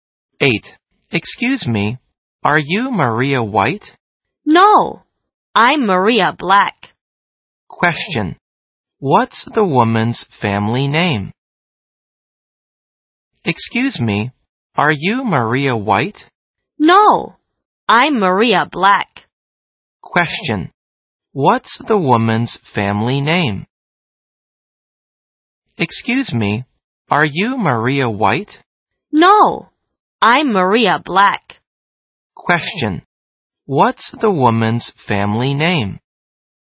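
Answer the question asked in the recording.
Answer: Black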